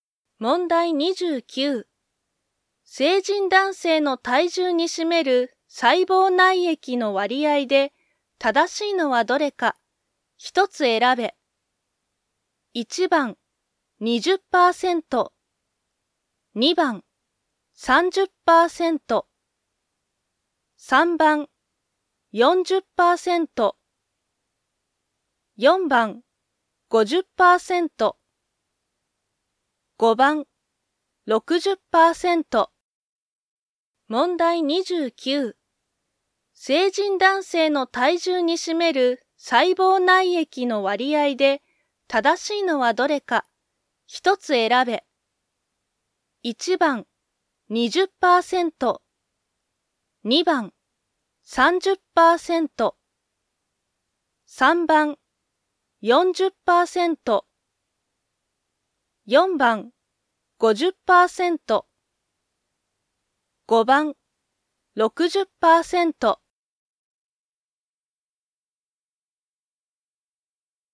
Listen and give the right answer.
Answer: 3番、